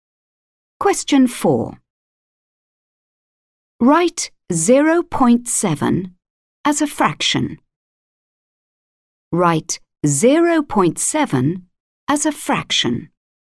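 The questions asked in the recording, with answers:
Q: Write 0.7 as a fraction.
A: 7/10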